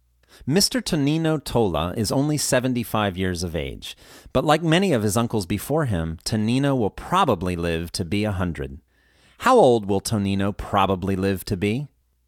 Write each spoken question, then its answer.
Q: How old will Tonino probably live to be?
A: Tonino will probably live to be 100.